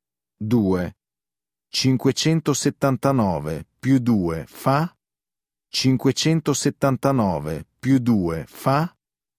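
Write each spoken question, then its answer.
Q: 579 più 2 fa?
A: 581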